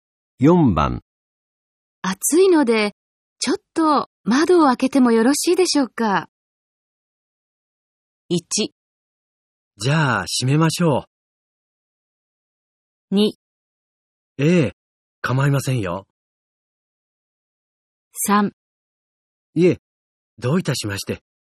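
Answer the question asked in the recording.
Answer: 2: ええ、構いませんよ。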